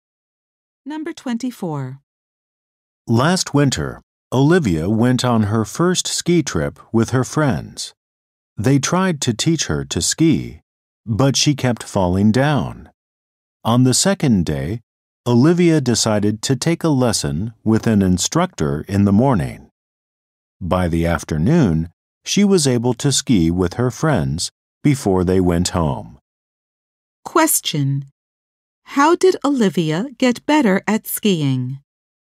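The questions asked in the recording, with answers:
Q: How did Olivia get better at skiing?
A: She took a lesson with an instructor.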